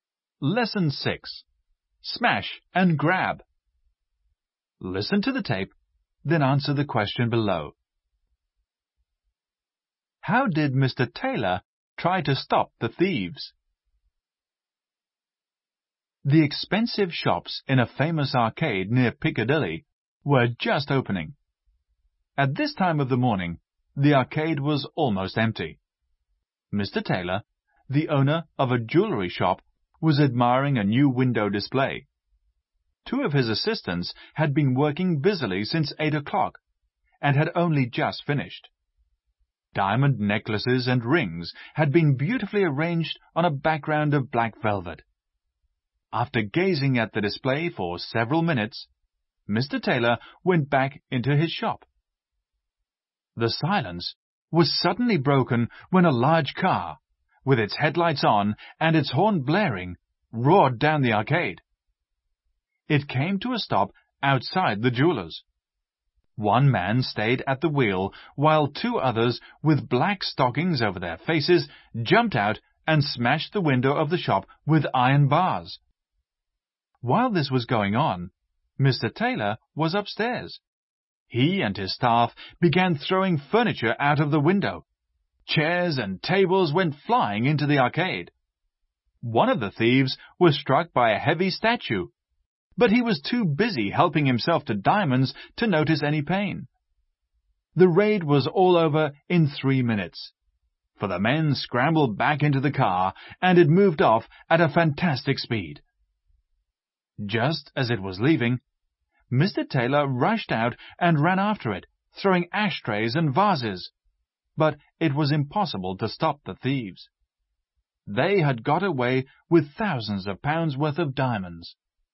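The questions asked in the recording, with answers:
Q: How did Mr. Taylor try to stop the thieves?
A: He and his staff threw furniture out of the window, and he ran after the car throwing ashtrays and vases.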